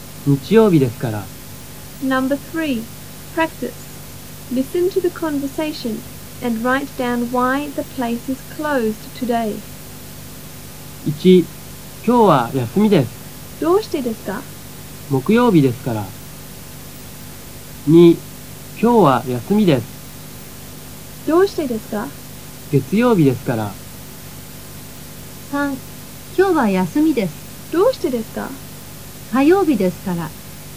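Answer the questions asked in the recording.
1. Because it is Thursday (木曜日ですから)
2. Because it is Monday (月曜日ですから)
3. Because it is Tuesday (火曜日ですから)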